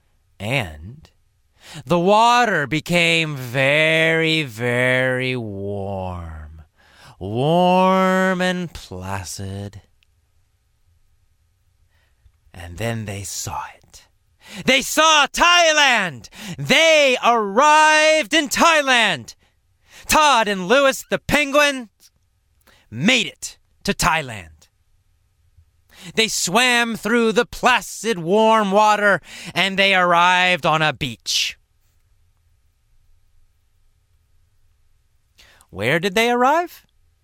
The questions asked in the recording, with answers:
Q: Where did they arrive?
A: They arrived on a beach in Thailand.